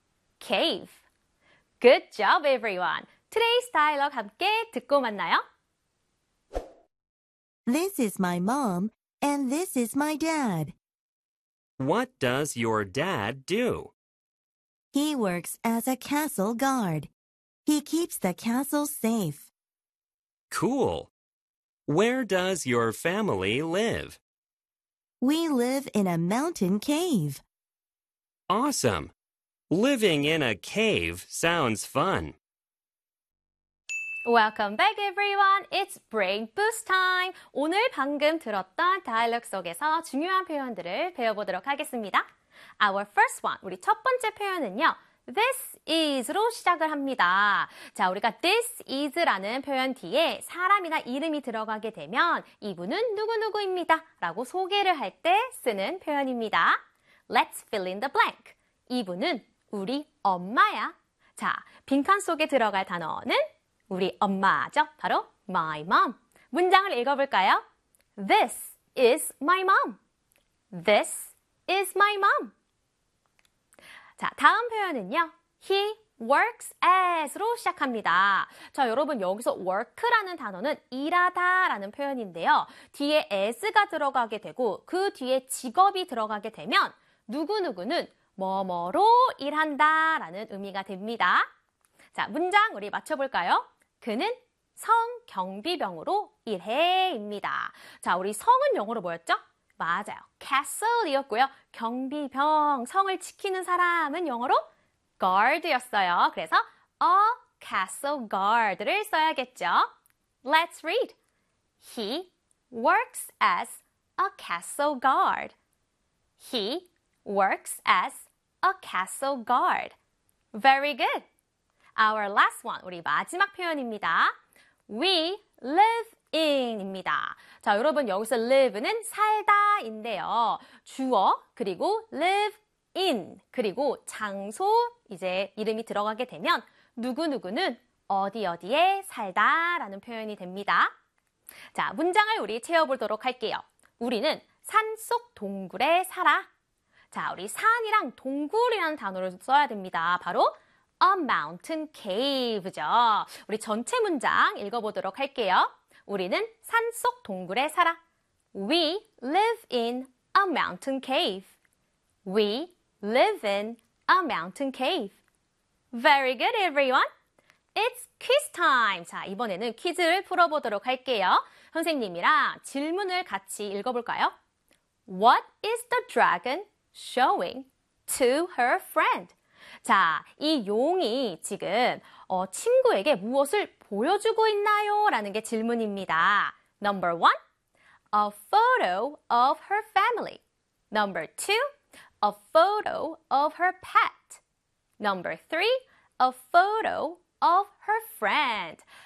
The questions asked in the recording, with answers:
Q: What is the dragon showing to her friend?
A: The answer is number one. A photo of her family.